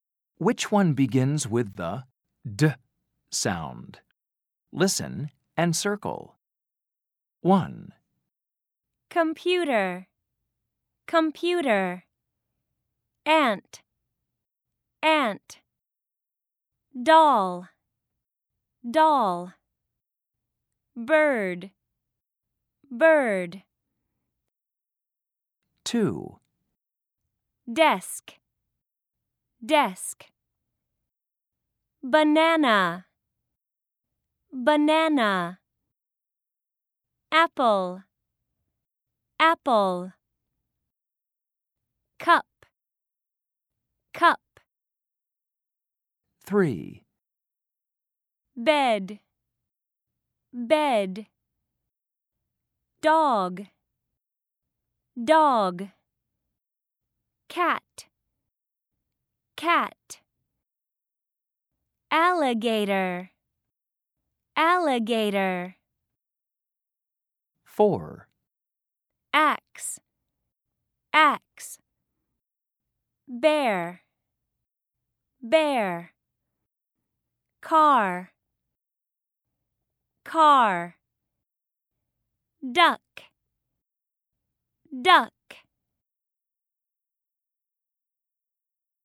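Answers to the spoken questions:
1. Doll
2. Desk
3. Dog
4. Duck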